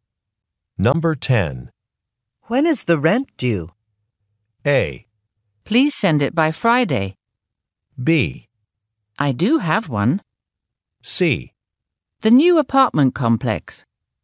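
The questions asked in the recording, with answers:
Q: When is the rent due?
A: A: Please send it by Friday.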